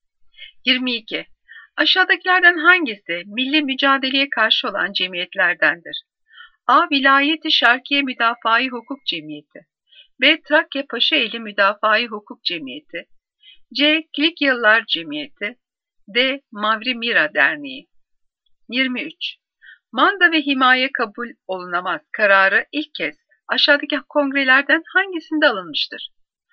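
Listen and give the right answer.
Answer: D: Mavri Mira Derneği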